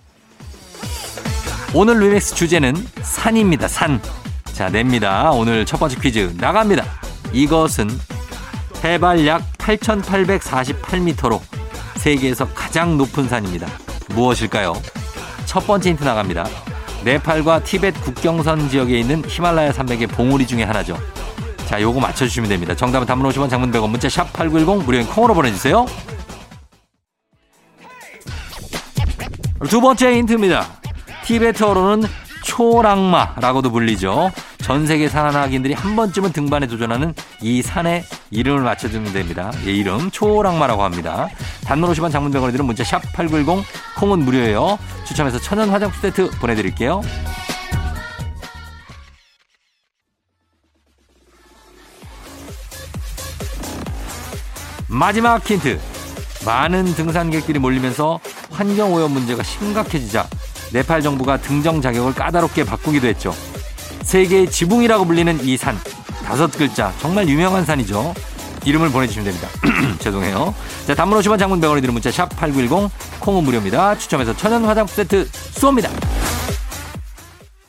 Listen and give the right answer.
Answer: 에베레스트입니다